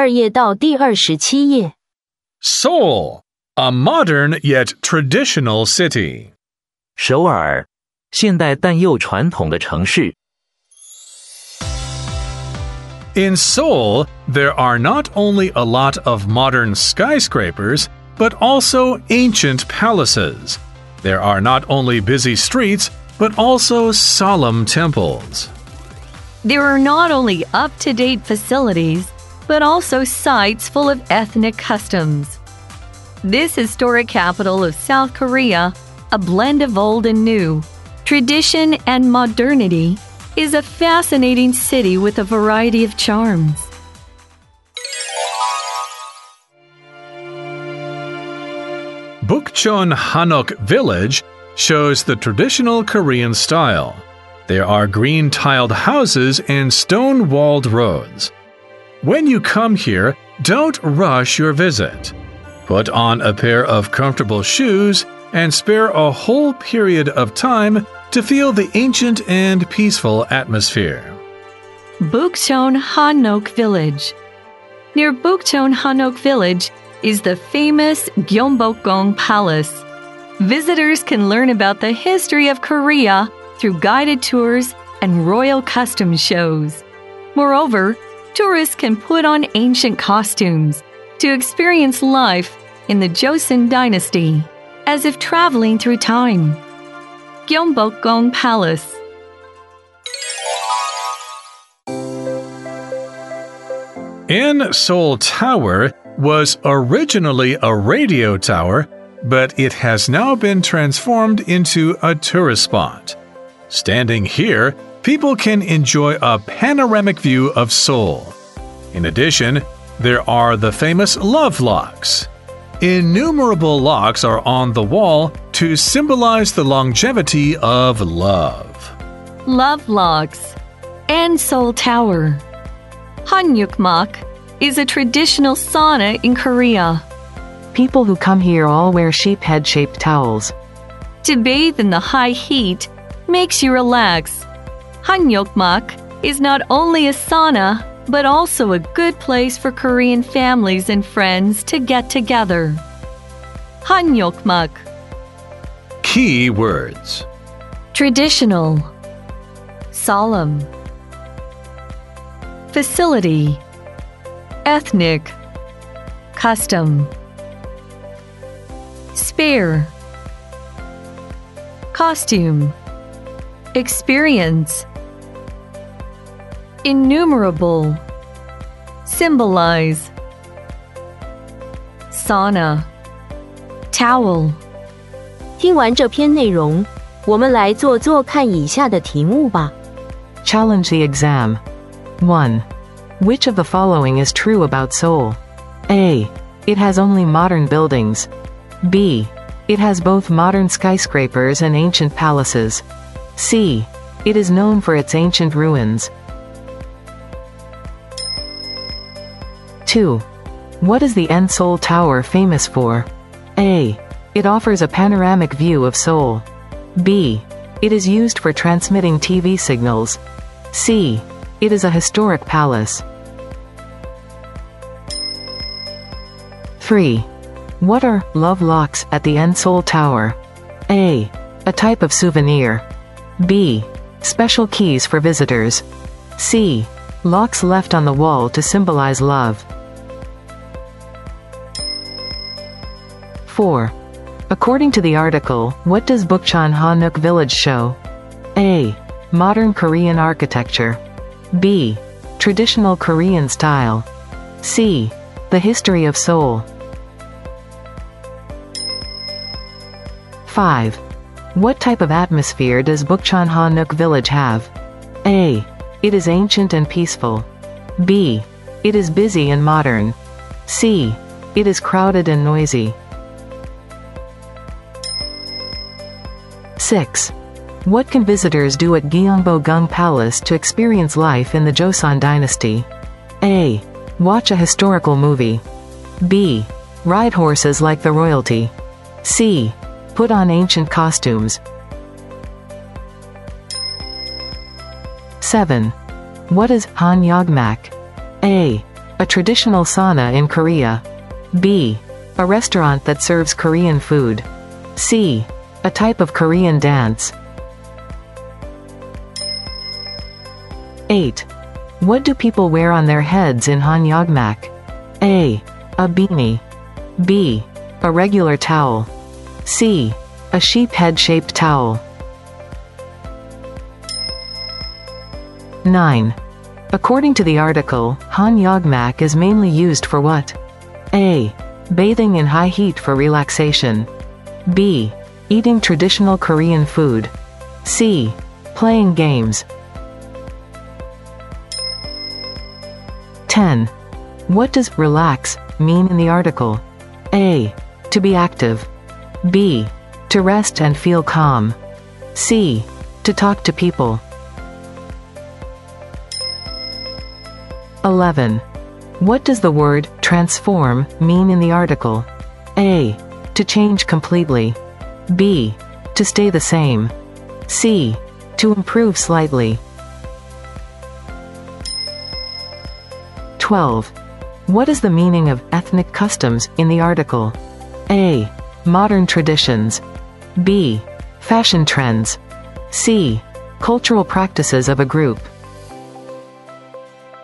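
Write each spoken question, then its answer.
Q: Which of the following is true about Seoul?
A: B: It has both modern skyscrapers and ancient palaces.

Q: What is the Enseol Tower famous for?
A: A: It offers a panoramic view of Seoul.

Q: What are love locks at the Enseol Tower?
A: C: Locks left on the wall to symbolize love.

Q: According to the article, what does Bukchon Hanok Village show?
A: B: Traditional Korean style.

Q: What type of atmosphere does Bukchon Hanok Village have?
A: A: It is ancient and peaceful.

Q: What can visitors do at Gyeongbokgung Palace to experience life in the Joseon Dynasty?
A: C: Put on ancient costumes.

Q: What is Hanyogmak?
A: A: A traditional sauna in Korea.

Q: What do people wear on their heads in Hanyogmak?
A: C: A sheep head-shaped towel.

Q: According to the article, Hanyogmak is mainly used for what?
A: A: Bathing in high heat for relaxation.

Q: What does relax mean in the article?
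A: B: To rest and feel calm.

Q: What does the word transform mean in the article?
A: A: To change completely.

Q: What is the meaning of ethnic customs in the article?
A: C: Cultural practices of a group.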